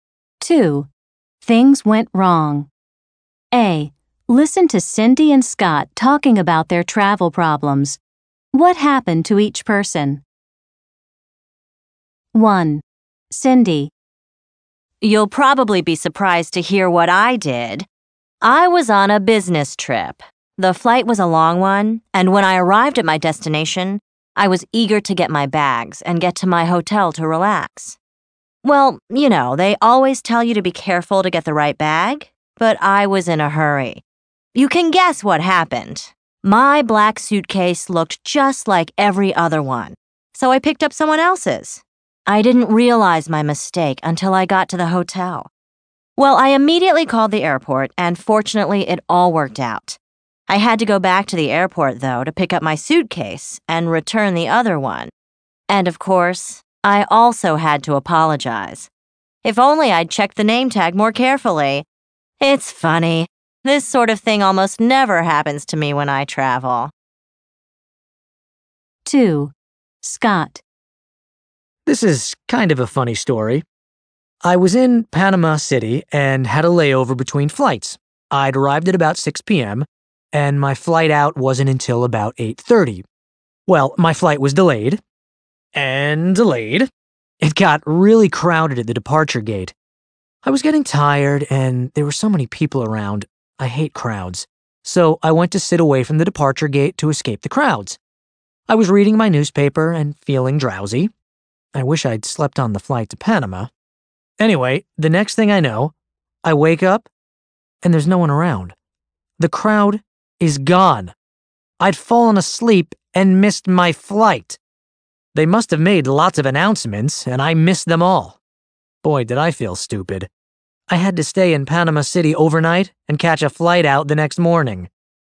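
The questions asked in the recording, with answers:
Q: What happened to each person? 1. Cindy.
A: She took someone else's suitcase by mistake

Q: 2. Scott.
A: He fell asleep and missed his flight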